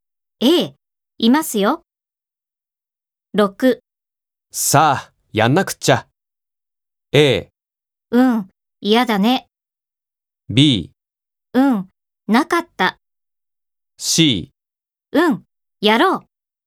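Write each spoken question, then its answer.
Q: さあ、やんなくっちゃ。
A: C: うん、やろう。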